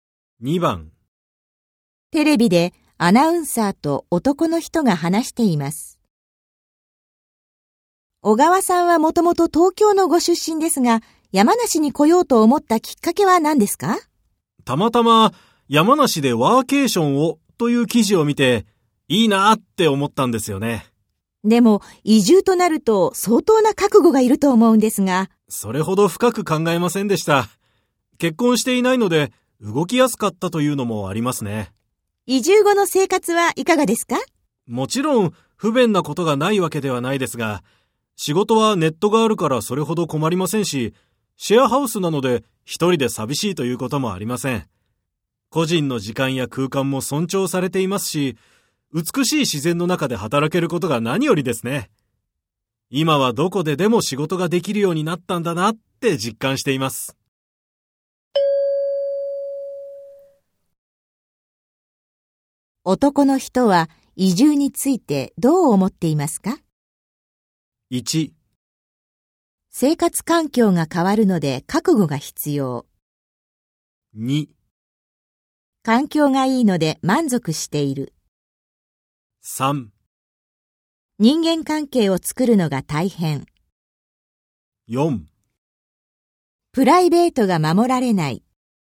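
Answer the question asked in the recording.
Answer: 2: 環境がいいので満足している。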